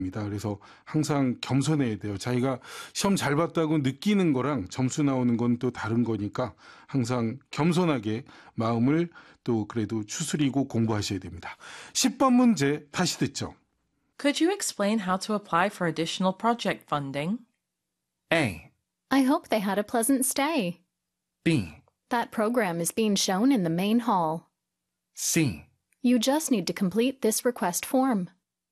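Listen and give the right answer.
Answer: C: You just need to complete this request form.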